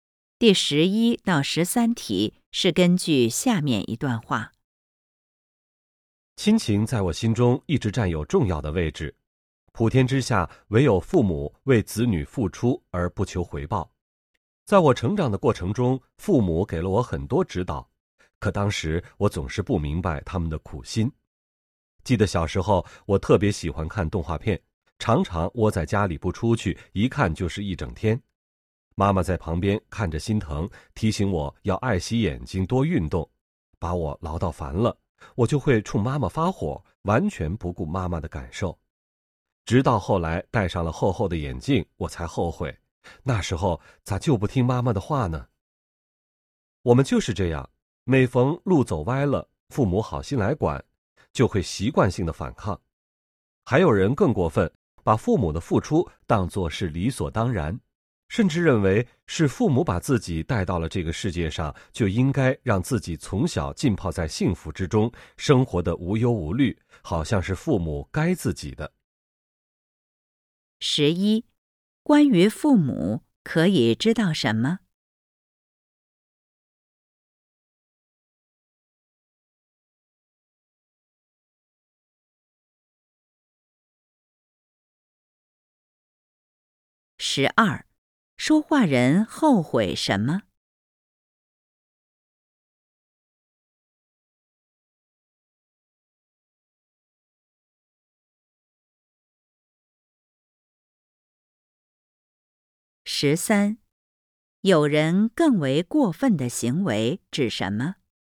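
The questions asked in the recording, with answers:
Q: 关于父母可以知道什么?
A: 父母为子女付出而不求回报

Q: 说话人后悔什么?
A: 小时候不听妈妈的话,只顾看动画片,后来戴上了厚眼镜

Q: 有人更为过分的行为指什么?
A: 把父母的付出当作理所当然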